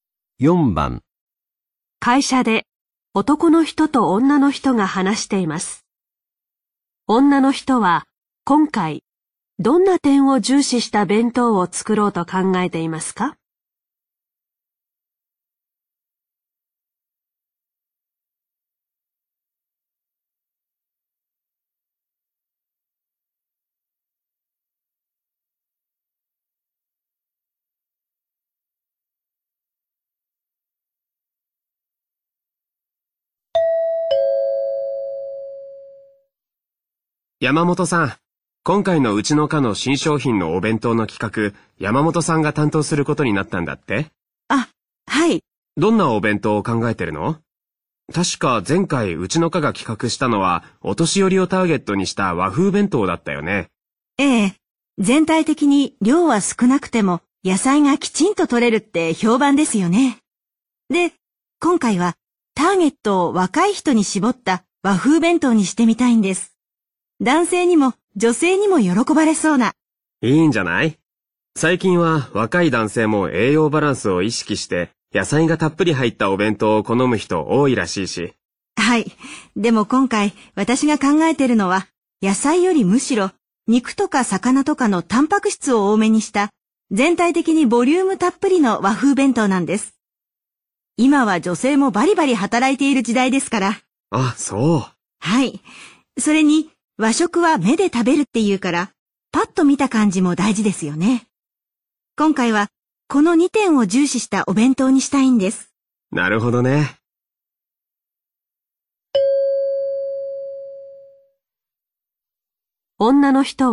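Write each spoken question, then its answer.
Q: は、今回、どんな点を重視した弁当を作ろうと考えていますか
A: ボリュームと見た目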